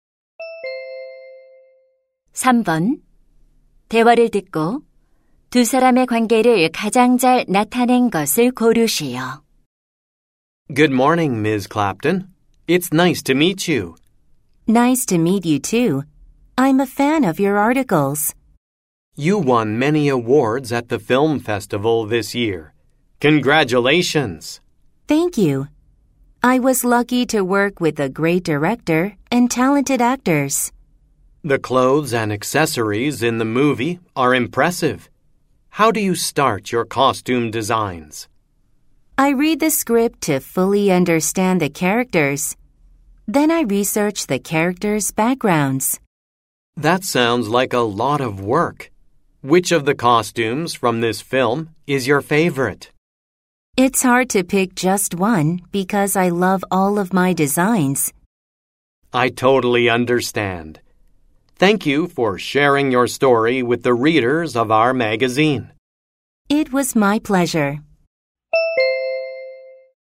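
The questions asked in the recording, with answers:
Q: 대화를 듣고 두 사람의 관계를 가장 잘 나타낸 것을 고르시오.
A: 잡지 기자 — 의상 디자이너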